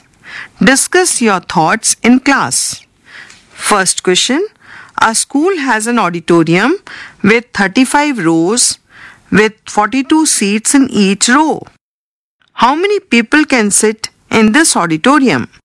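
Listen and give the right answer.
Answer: 1470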